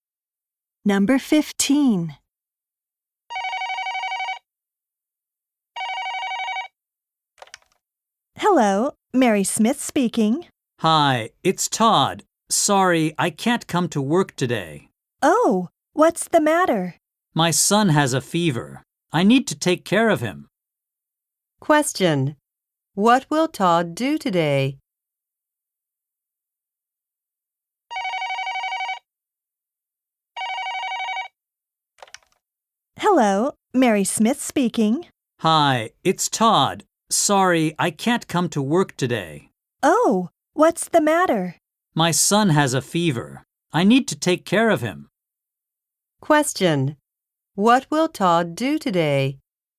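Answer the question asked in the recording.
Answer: Take care of his son.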